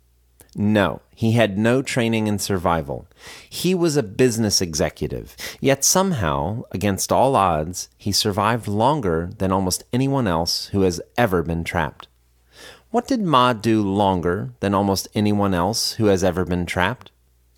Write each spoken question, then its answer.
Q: What did Ma do longer than almost anyone else who has ever been trapped?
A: He survived longer than almost anyone else who has ever been trapped.